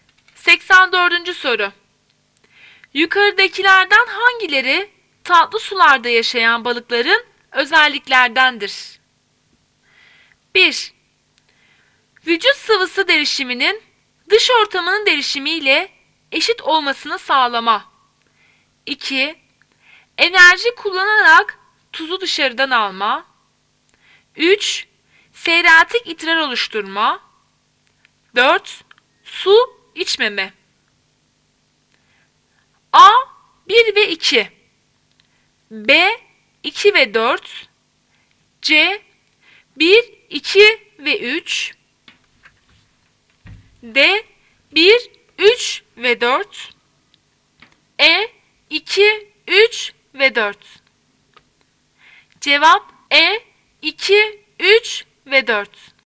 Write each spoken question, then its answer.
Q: Yukarıdakilerden hangileri tatlı sularda yaşayan balıkların özelliklerdendir?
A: Cevap E. 2, 3 ve 4.